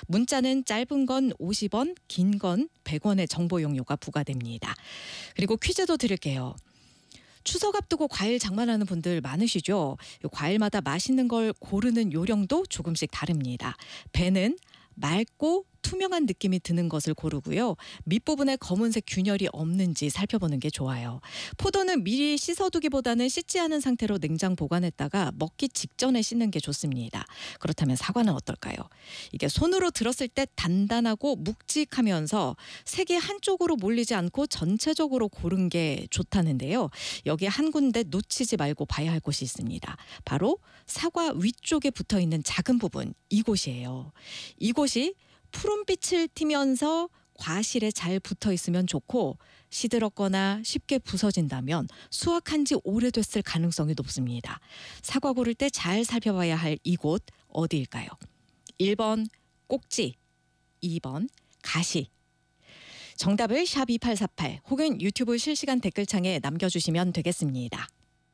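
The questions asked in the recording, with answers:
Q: 사과 고를 때 잘 살펴봐야 할 이곳 어디일까요?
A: 1번: 꼭지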